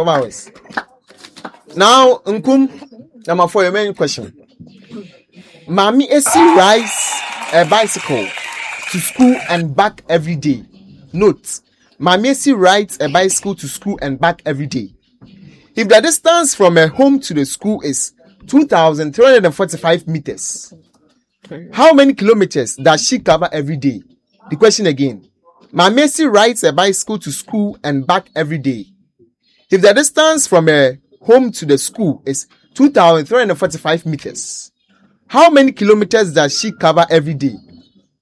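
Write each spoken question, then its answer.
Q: If the distance from her home to the school is 2,345 meters, how many kilometers does she cover every day?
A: 4.69 kilometers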